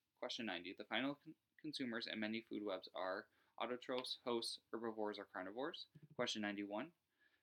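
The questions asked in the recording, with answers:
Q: The final consumers in many food webs are autotrophs, hosts, herbivores, or carnivores.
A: 4: carnivores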